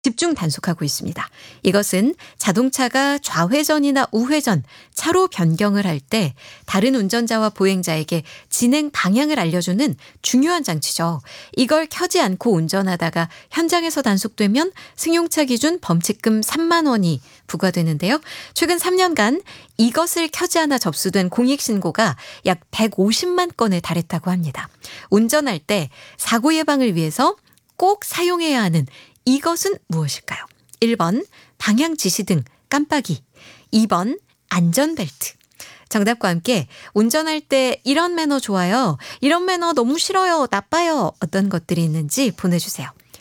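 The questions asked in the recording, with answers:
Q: 운전할 때 사고 예방을 위해서 꼭 사용해야 하는 이것은 무엇일까요?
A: 1번: 방향 지시등 깜빡이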